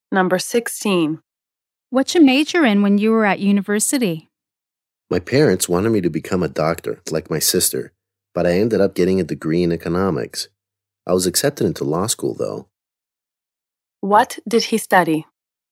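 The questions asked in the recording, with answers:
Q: What did he study?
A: Economics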